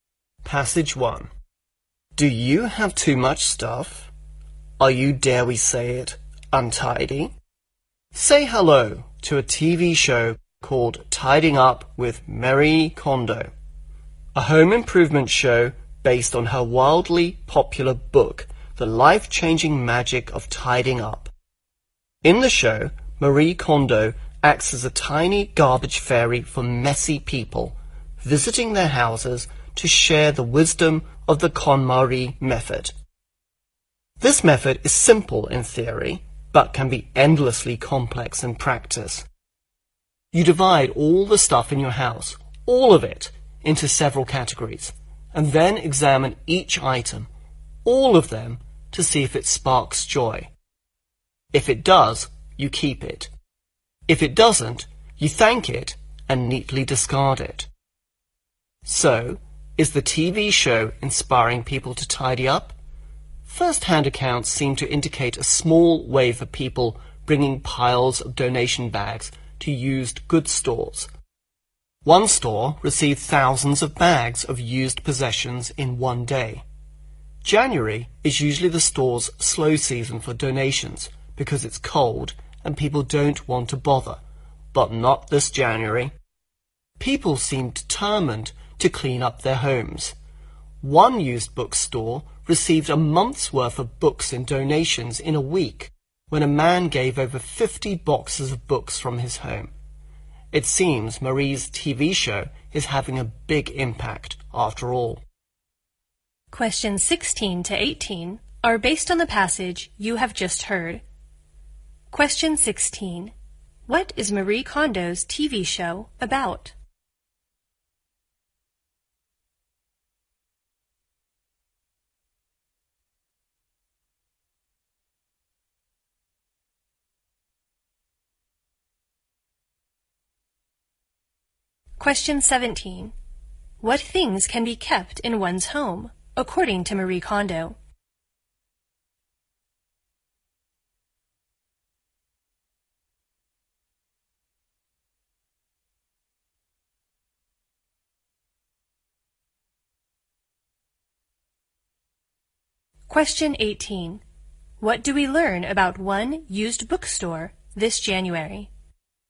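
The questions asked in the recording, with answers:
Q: What is Marie Kondo's TV show about?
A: Home improvement: helping messy people tidy up

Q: What things can be kept in one's home, according to Marie Kondo?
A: Things that spark joy

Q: What do we learn about one used bookstore this January?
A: It received a month's worth of books in a week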